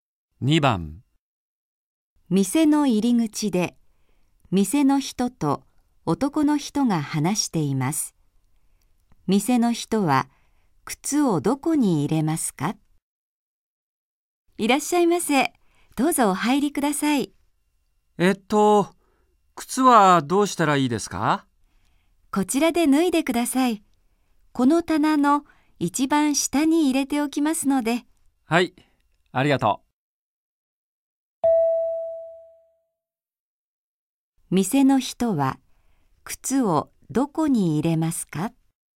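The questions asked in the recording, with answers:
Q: 店の人は靴をどこに入れますか?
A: 棚の一番下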